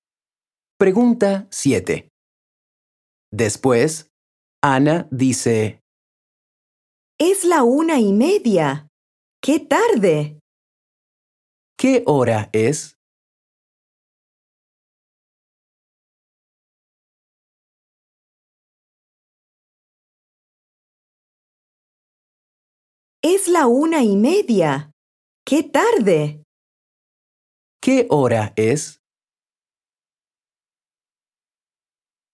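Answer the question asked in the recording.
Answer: La 1:30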